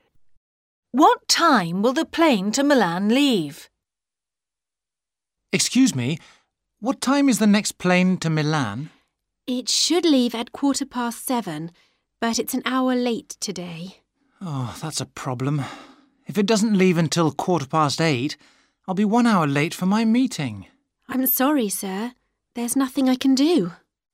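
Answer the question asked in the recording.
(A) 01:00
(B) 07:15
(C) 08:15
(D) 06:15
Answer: (C) 08:15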